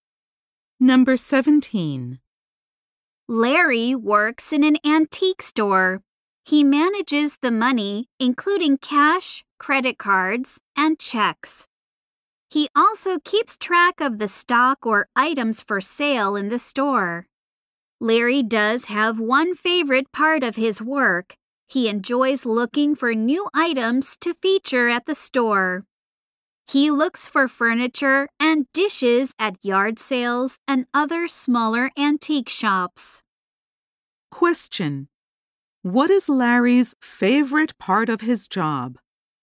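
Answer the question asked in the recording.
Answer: Looking for new items to feature at the store.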